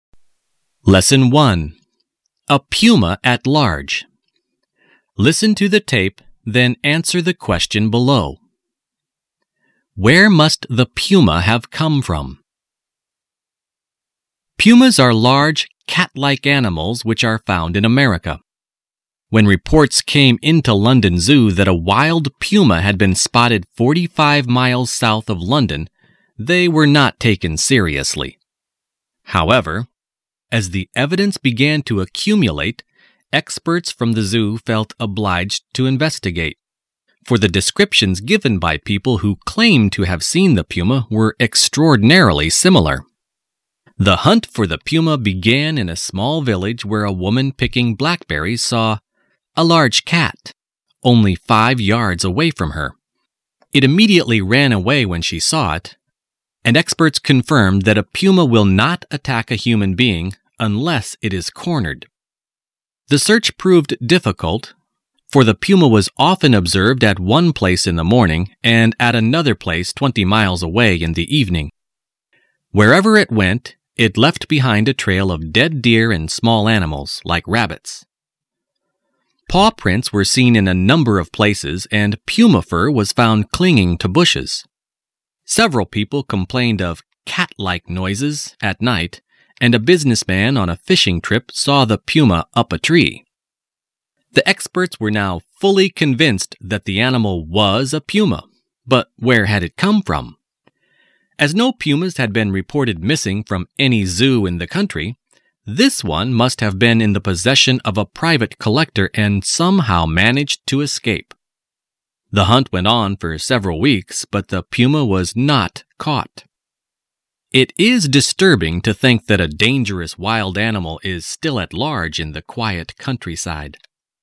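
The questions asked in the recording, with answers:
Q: Where must the puma have come from?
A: From a private collector, from whom it somehow escaped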